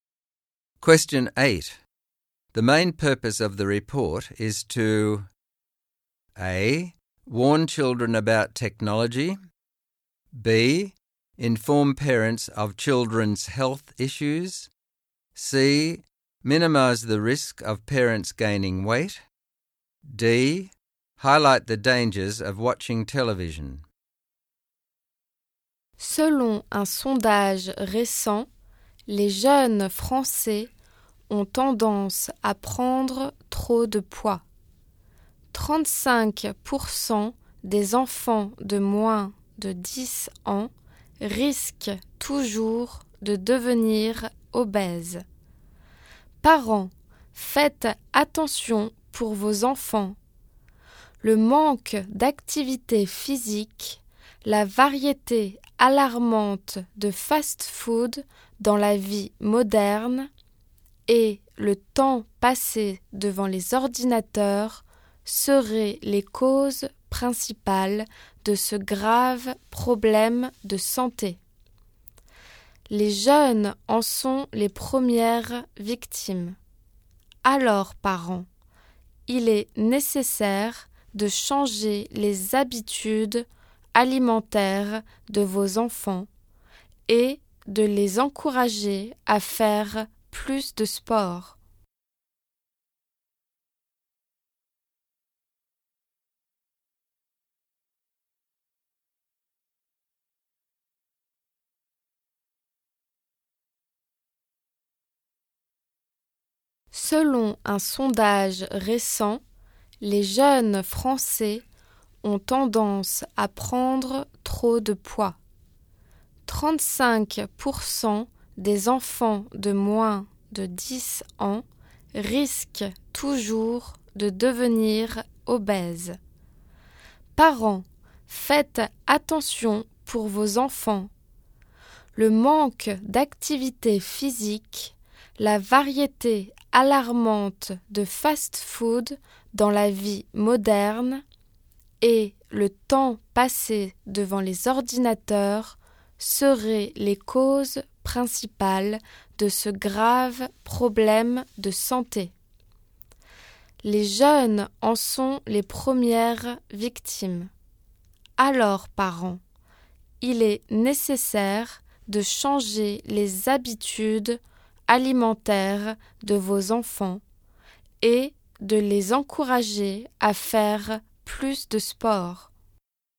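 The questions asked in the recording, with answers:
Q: The main purpose of the report is to A.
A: B: Inform parents of children's health issues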